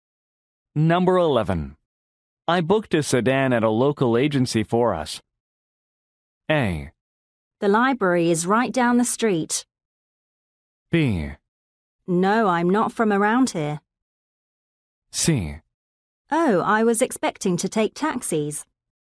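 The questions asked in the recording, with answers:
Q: I booked a sedan at a local agency for us.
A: C: Oh, I was expecting to take taxis.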